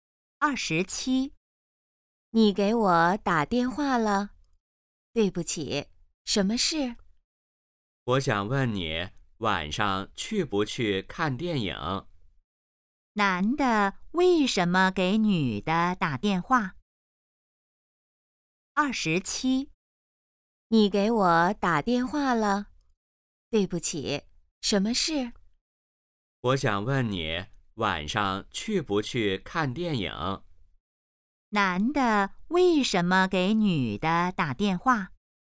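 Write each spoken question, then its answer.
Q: 男的为什么给女的打电话?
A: 问她晚上去不去看电影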